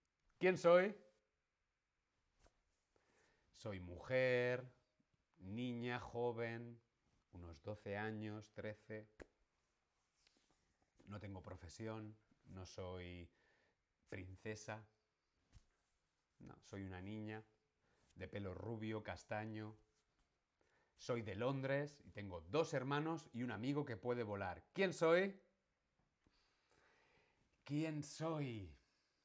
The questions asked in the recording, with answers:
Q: ¿Quién soy?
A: soy Wendy.